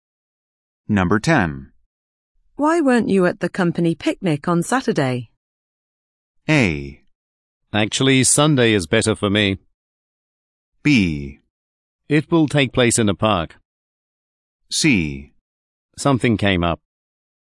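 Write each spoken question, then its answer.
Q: Why weren't you at the company picnic on Saturday?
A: C: Something came up.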